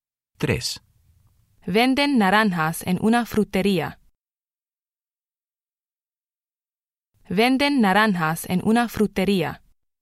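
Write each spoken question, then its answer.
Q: Venden naranjas en una frutería.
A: sí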